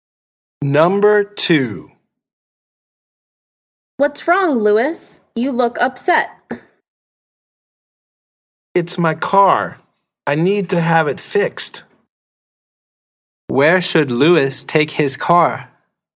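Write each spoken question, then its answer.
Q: Where should Lewis take his car?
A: a garage / mechanic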